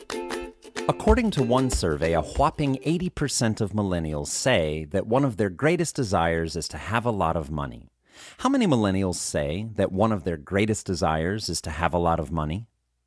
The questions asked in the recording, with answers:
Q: How many millennials say that one of their greatest desires is to have a lot of money?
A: A whopping 80% of millennials say that one of their greatest desires is to have a lot of money, and 50% want to be famous.